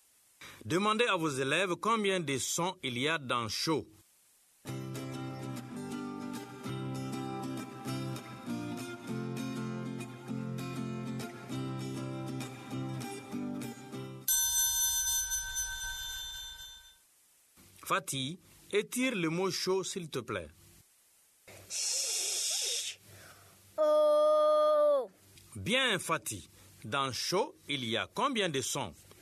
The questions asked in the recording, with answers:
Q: Dans chaud, il y a combien de sons?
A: Monsieur, 2.